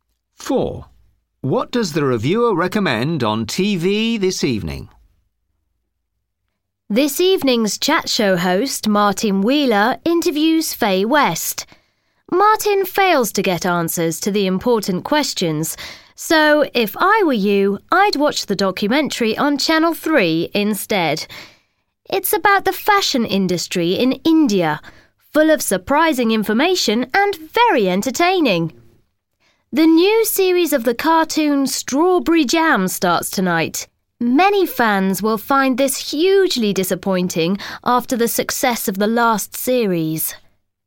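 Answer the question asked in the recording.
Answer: the documentary on Channel 3 about the fashion industry in India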